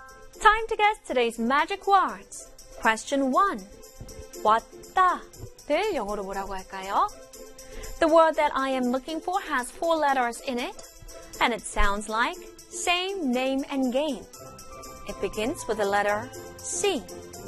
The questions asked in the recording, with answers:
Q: 왔다를 영어로 뭐라고 할까요?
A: 왔다 in English, C-A-M-E, came.